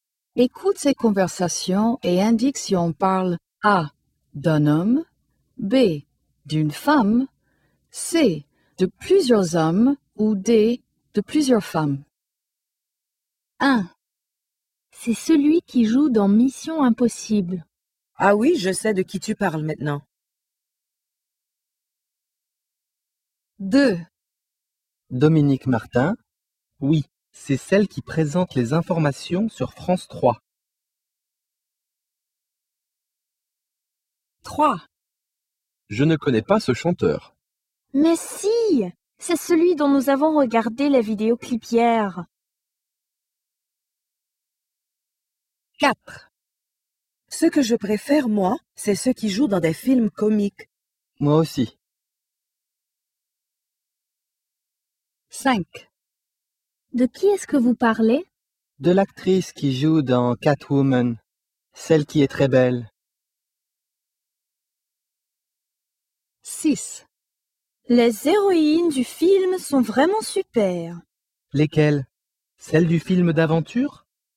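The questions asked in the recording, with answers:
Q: Écoute ces conversations et indique si on parle A, d'un homme, B, d'une femme, C, de plusieurs hommes ou D, de plusieurs femmes.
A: A: d'un homme

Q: Écoute ces conversations et indique si on parle A, d'un homme, B, d'une femme, C, de plusieurs hommes ou D, de plusieurs femmes.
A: B: d'une femme

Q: Écoute ces conversations et indique si on parle A, d'un homme, B, d'une femme, C, de plusieurs hommes ou D, de plusieurs femmes.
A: A: d'un homme

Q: Écoute ces conversations et indique si on parle A, d'un homme, B, d'une femme, C, de plusieurs hommes ou D, de plusieurs femmes.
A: C: de plusieurs hommes

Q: Écoute ces conversations et indique si on parle A, d'un homme, B, d'une femme, C, de plusieurs hommes ou D, de plusieurs femmes.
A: B: d'une femme

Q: Écoute ces conversations et indique si on parle A, d'un homme, B, d'une femme, C, de plusieurs hommes ou D, de plusieurs femmes.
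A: D: de plusieurs femmes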